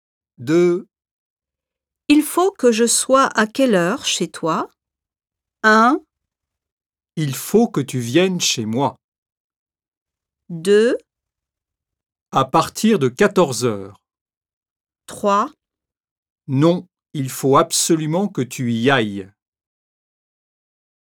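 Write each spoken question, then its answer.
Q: Il faut que je sois à quelle heure chez toi?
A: 2: À partir de 14 heures.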